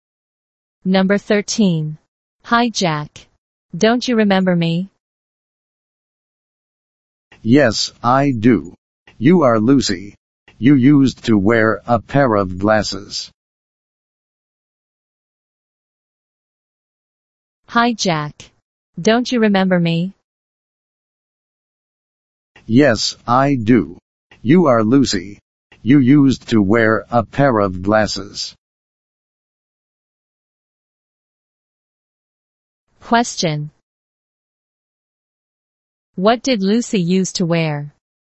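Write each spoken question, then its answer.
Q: What did Lucy used to wear?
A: A pair of glasses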